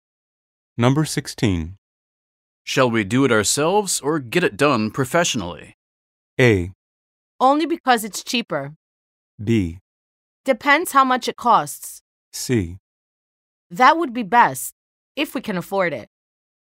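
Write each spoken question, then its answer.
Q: Shall we do it ourselves or get it done professionally?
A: B: Depends how much it costs.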